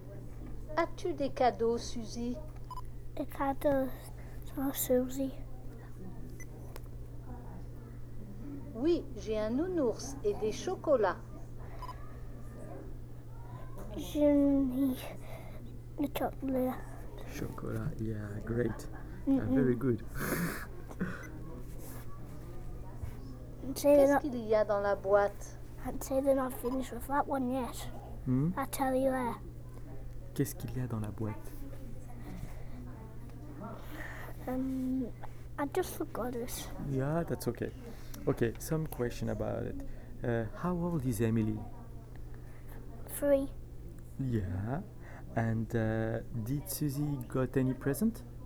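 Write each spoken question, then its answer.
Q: And did Susie got any present?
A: Yes, a teddy bear and chocolates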